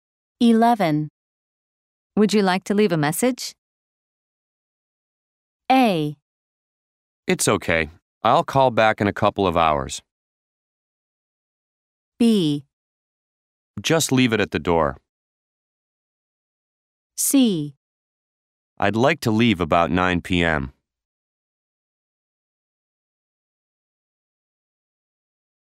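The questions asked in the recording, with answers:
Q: Would you like to leave a message?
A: A: It's okay. I'll call back in a couple of hours.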